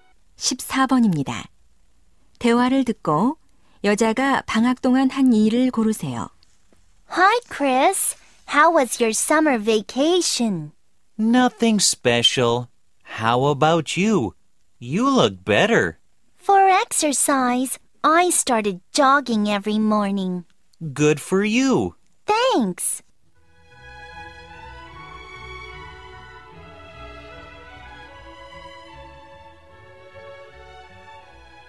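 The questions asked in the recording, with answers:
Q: 대화를 듣고 여자가 방학 동안 한 일을 고르세요.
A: 매일 아침 조깅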